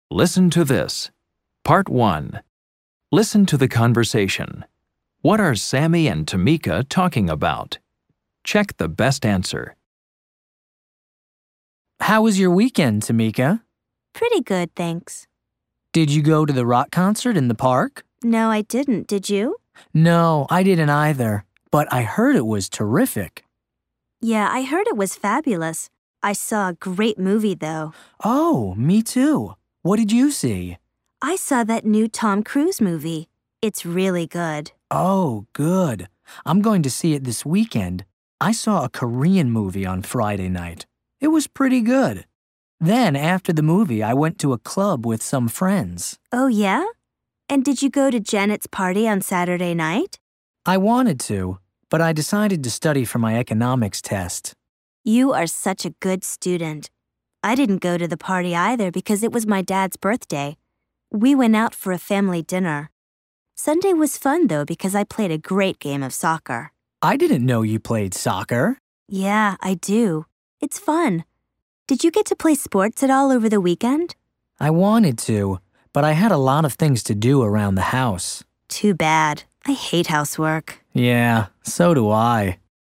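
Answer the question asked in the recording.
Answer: What they did last weekend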